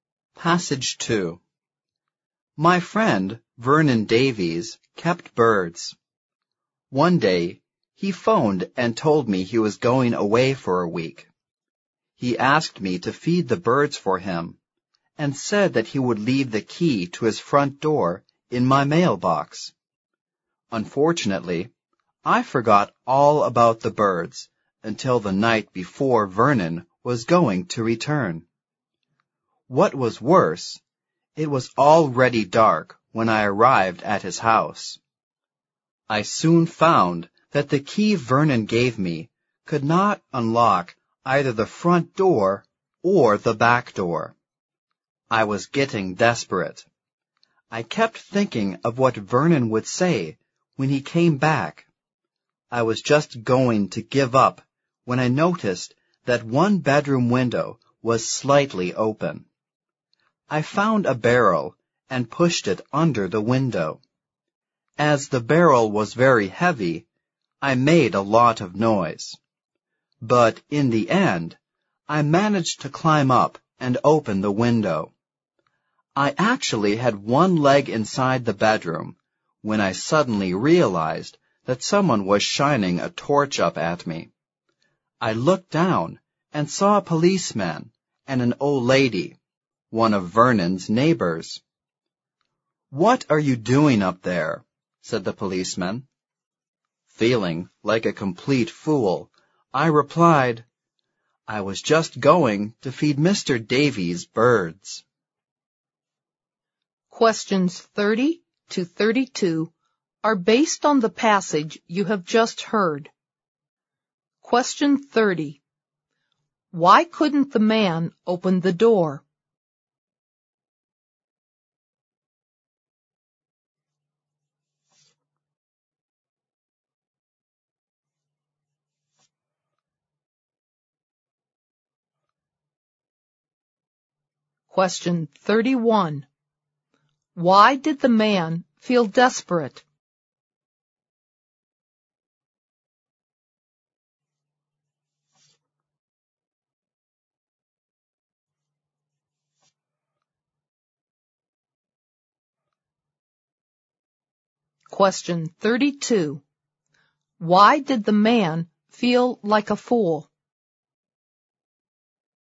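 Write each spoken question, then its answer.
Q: Why couldn't the man open the door?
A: The key Vernon gave him did not fit either door.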